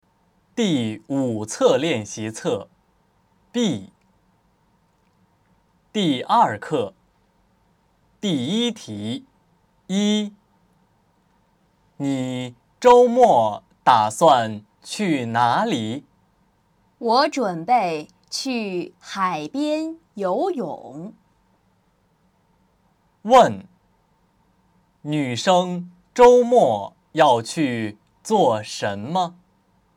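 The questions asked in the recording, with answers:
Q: 问:女生周末要去做什么?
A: 去海边游泳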